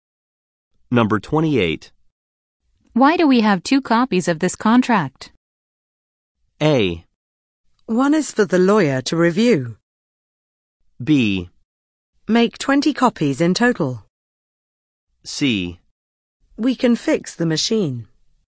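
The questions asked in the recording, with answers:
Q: Why do we have two copies of this contract?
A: A: One is for the lawyer to review.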